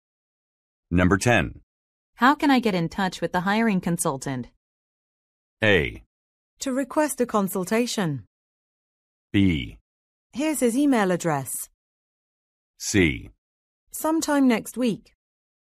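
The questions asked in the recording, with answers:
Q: How can I get in touch with the hiring consultant?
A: B: Here's his email address.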